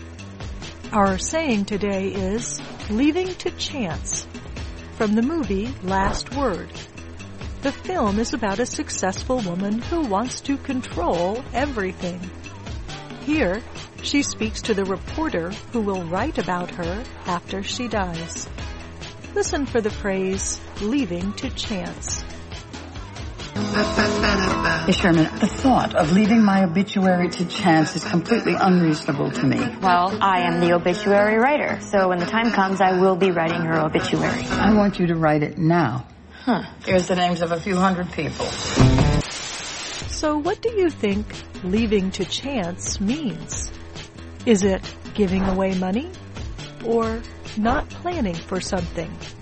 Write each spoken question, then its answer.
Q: So what do you think leaving to chance means?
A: Leaving to chance means not planning for something.